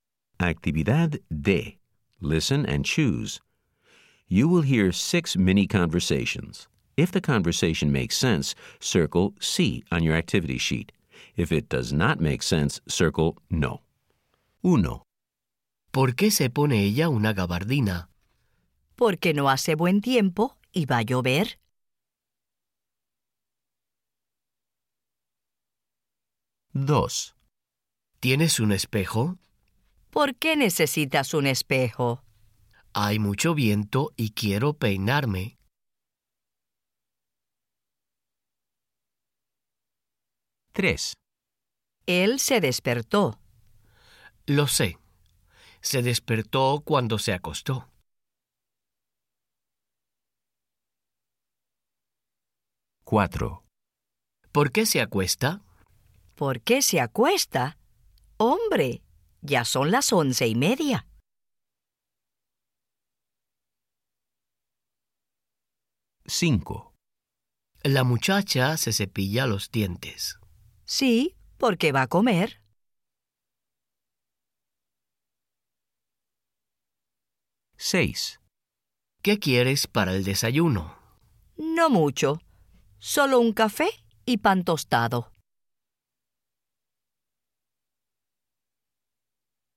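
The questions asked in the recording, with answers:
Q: ¿Por qué se pone ella una gabardina?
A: Sí

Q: ¿Tienes un espejo?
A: Sí

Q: Él se despertó.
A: No

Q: ¿Por qué se acuesta?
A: Sí

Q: ¿Qué quieres para el desayuno?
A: Sí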